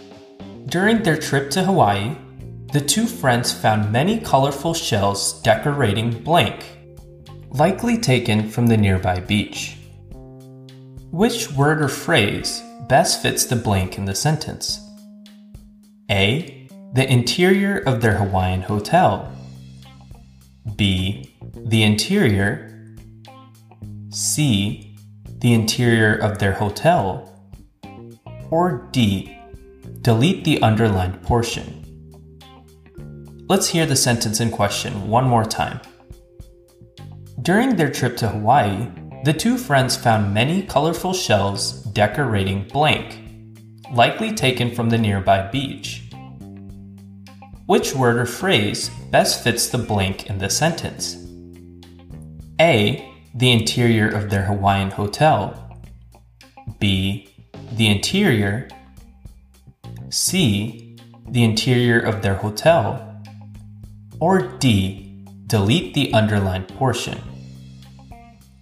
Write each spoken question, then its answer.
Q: Which word or phrase best fits the blank in the sentence?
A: This leaves us with C, the interior of their hotel, as our correct answer.